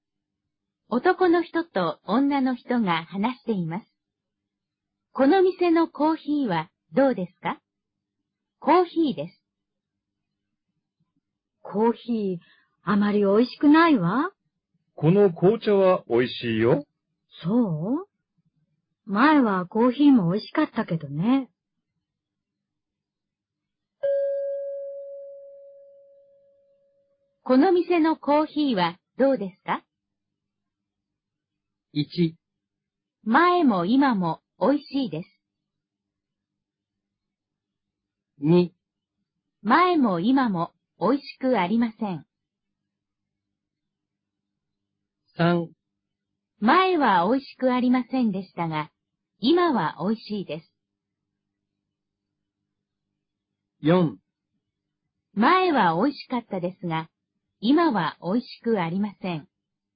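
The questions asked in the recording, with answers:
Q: この店のコーヒーはどうですか?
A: 4: 前は美味しかったですが、今は美味しくありません。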